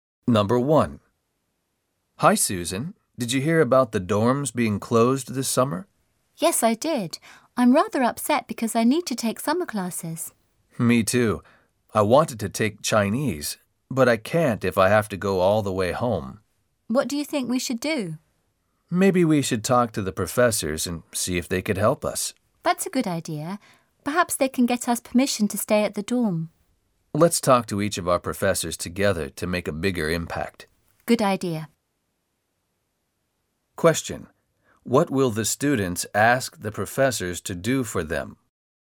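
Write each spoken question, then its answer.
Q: What will the students ask the professors to do for them?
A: Help them get permission to stay at the dorm over the summer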